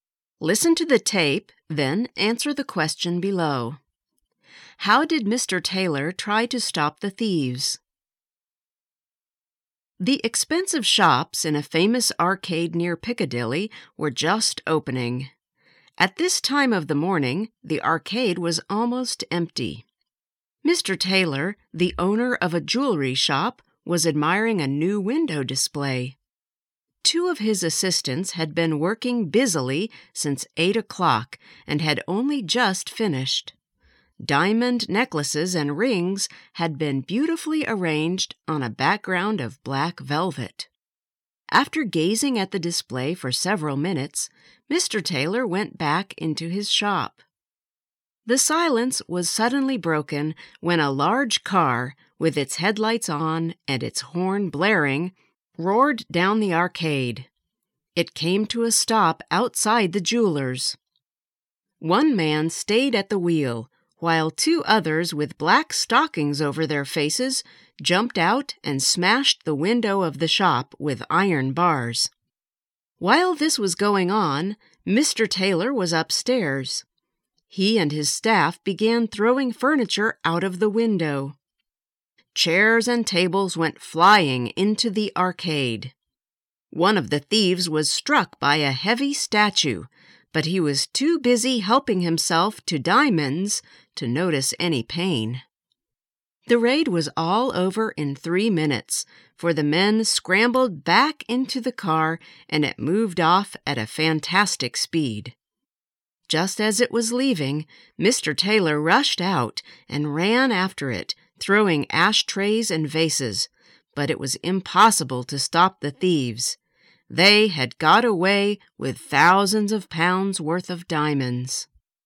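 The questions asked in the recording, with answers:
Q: How did Mr. Taylor try to stop the thieves?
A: He and his staff threw furniture out of the window, and he ran after the car throwing ashtrays and vases.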